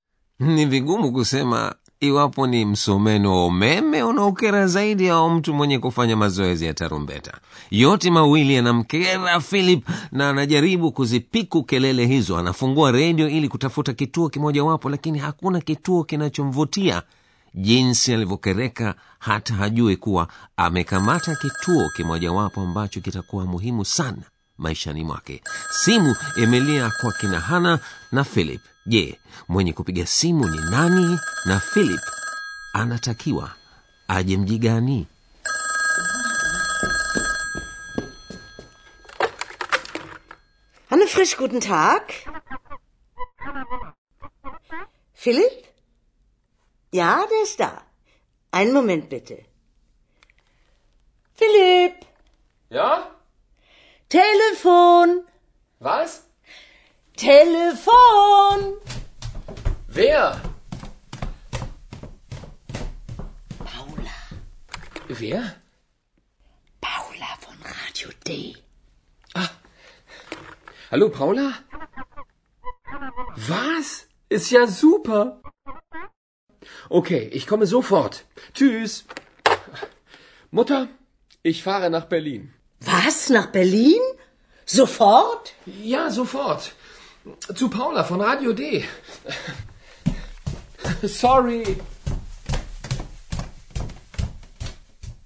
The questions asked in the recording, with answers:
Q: je mwenye kupiga simu ni nani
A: Bibi mmoja aitwaye Paula amepiga simu kutoka kituo cha redio Radio Day

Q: na philip anatakiwa aje mji gani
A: na anamtaka Philip aje Berlin.